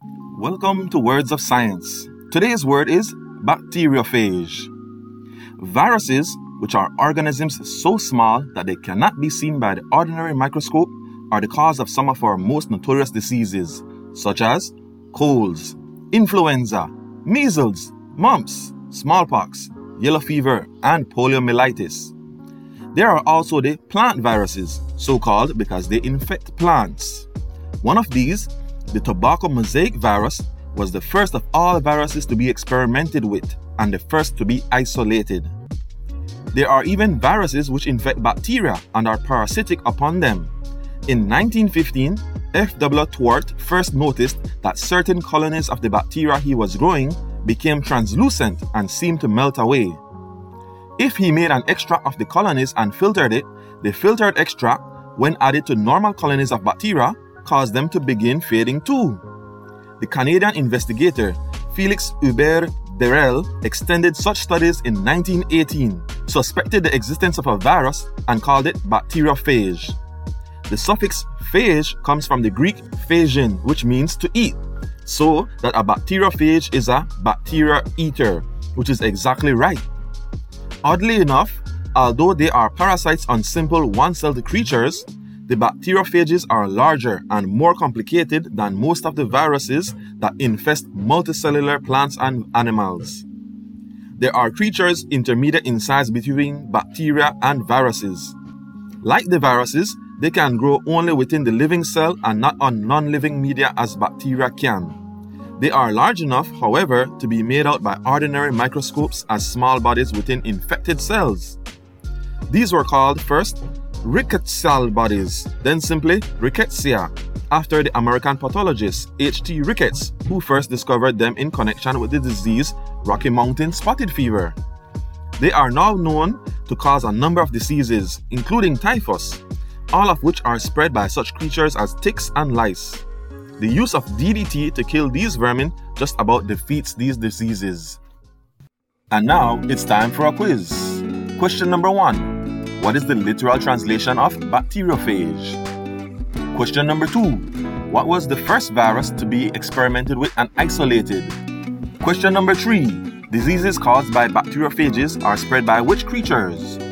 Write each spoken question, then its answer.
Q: What is the literal translation of bacteriophage?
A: bacteria eater

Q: What was the first virus to be experimented with and isolated?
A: the tobacco mosaic virus